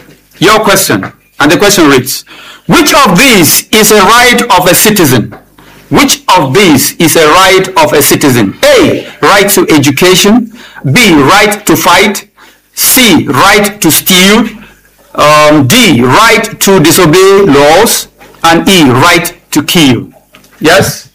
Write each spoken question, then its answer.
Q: which of these is a right of a citizen?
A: It's A, right to education.